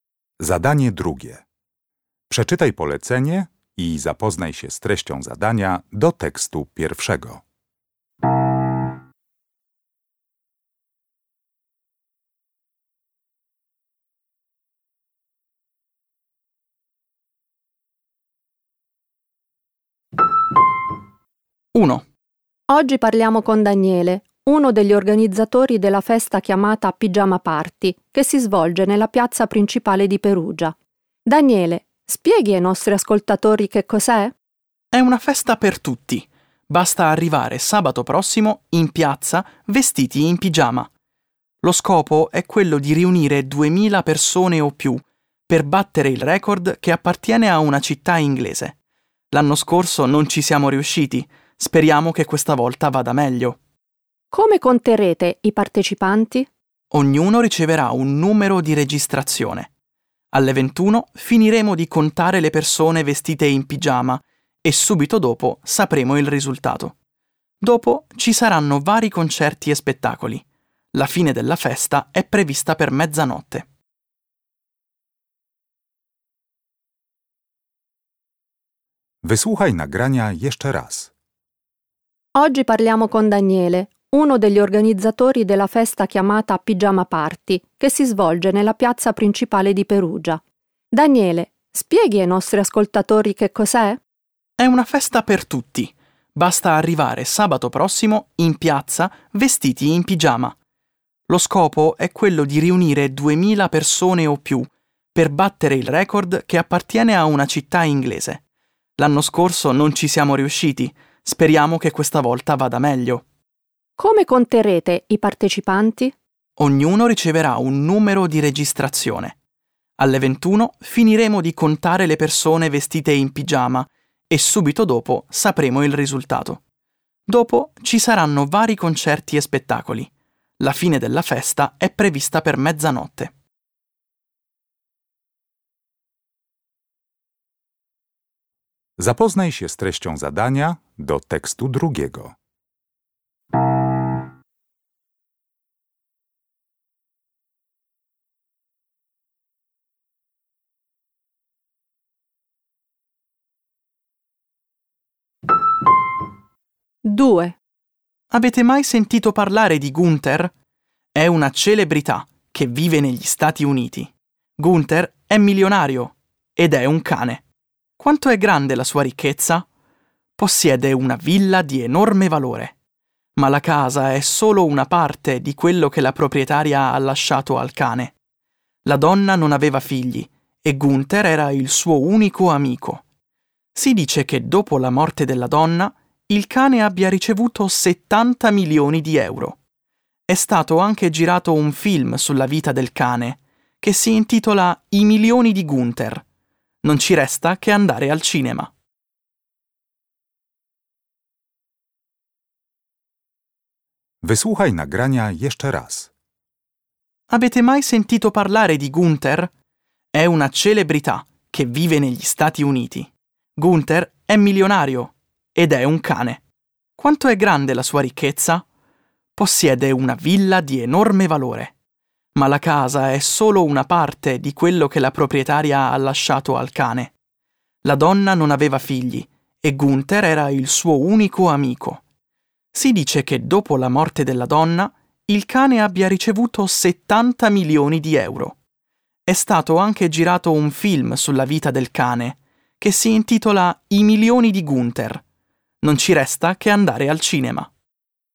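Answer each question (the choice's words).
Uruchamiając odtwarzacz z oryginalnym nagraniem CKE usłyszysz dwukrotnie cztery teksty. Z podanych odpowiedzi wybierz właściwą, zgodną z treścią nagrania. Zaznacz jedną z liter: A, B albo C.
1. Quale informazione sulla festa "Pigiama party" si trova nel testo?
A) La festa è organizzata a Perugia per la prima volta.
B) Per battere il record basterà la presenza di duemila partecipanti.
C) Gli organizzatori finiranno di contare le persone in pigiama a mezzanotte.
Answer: Per battere il record basterà la presenza di duemila partecipanti.

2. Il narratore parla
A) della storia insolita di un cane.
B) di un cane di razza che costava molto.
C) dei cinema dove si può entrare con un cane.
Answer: della storia insolita di un cane.

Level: Poziom: podstawowy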